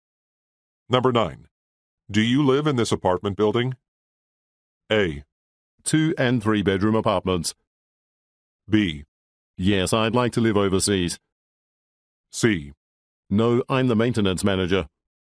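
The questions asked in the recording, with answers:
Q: Do you live in this apartment building?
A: C: No, I'm the maintenance manager.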